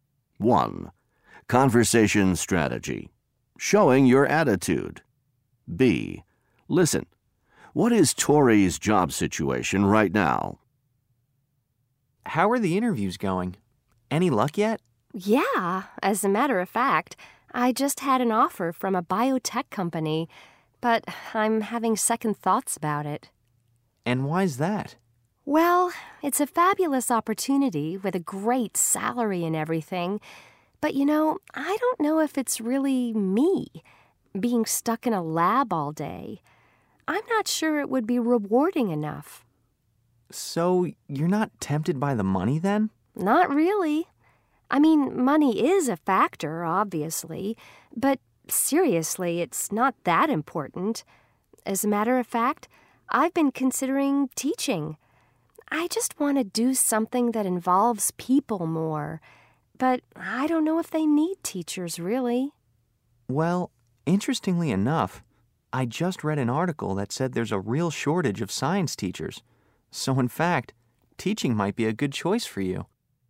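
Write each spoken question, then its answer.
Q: What is Tori's job situation right now?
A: She has an offer from a biotech company but is having second thoughts and is considering teaching.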